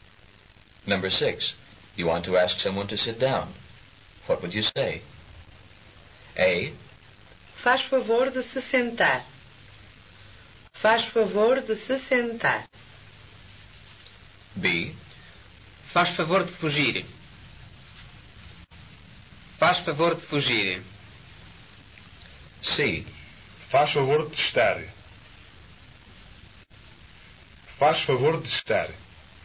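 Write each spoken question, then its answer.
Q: You want to ask someone to sit down.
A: A: Faz favor de se sentar.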